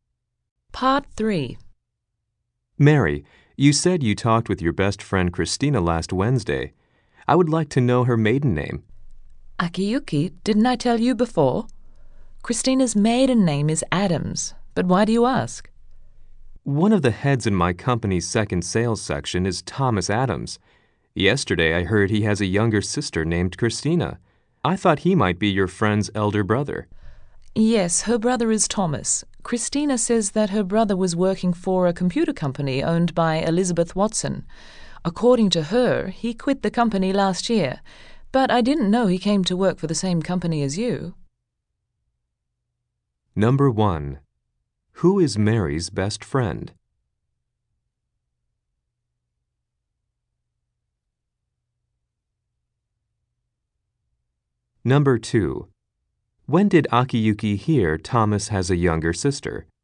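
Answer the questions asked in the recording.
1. Christina (Adams)
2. Yesterday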